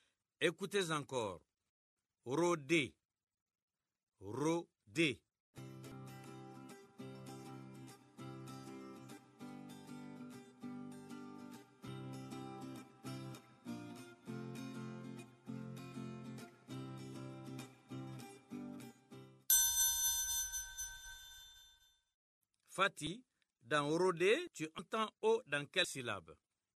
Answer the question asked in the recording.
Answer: Monsieur, dans Ro, la première syllabe.